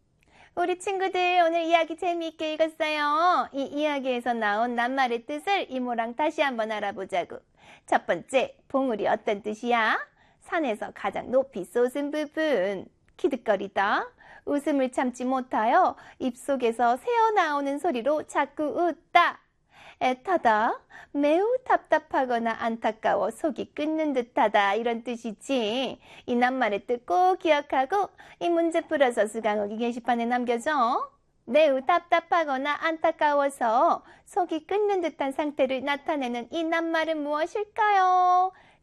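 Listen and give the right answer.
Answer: 애타다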